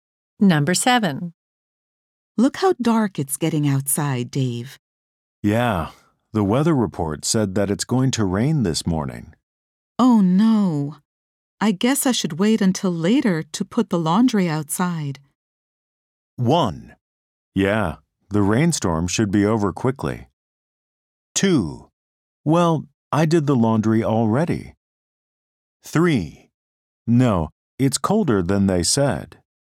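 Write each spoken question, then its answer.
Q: Oh no. I guess I should wait until later to put the laundry outside.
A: 1: Yeah, the rainstorm should be over quickly.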